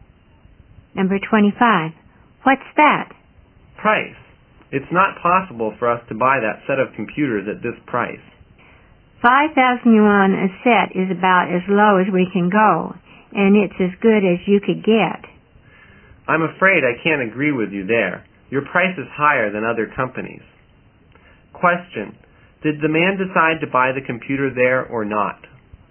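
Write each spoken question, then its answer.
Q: Did the man decide to buy the computer there or not?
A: No, the price was too high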